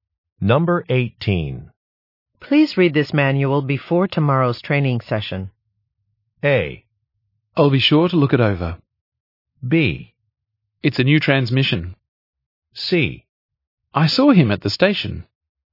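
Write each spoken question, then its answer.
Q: Please read this manual before tomorrow's training session.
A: A: I'll be sure to look it over.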